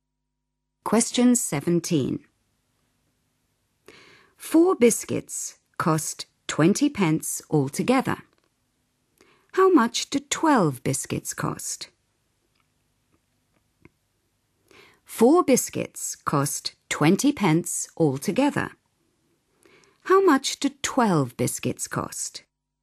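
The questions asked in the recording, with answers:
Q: How much do 12 biscuits cost?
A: 60 pence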